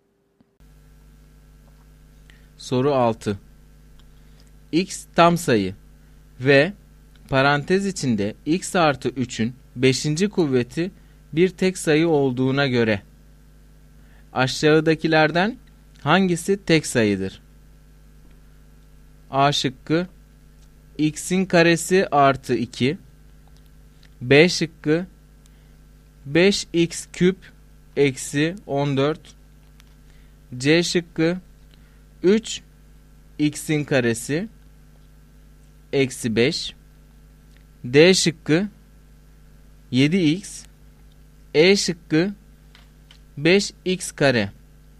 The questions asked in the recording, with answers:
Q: X tam sayı ve parantez içinde x artı 3'ün 5. kuvveti bir tek sayı olduğuna göre aşağıdakilerden hangisi tek sayıdır?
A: Doğru cevap C şıkkı.